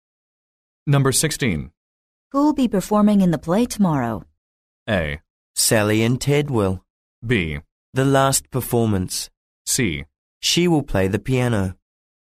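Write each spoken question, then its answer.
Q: Who will be performing in the play tomorrow?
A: A: Sally and Ted will.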